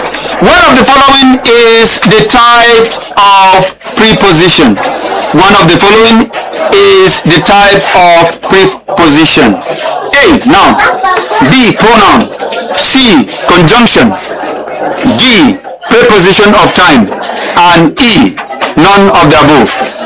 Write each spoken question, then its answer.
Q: One of the following is the type of preposition.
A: Of time.